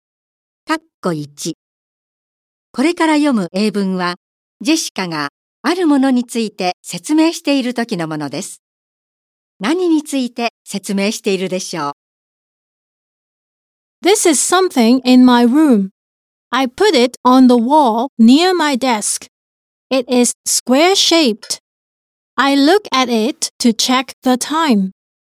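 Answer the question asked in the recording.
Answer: 時計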